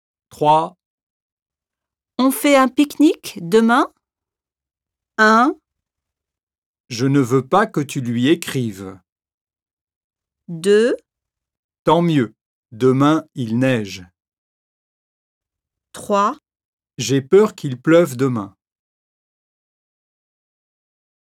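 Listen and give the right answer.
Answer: 3: J'ai peur qu'il pleuve demain.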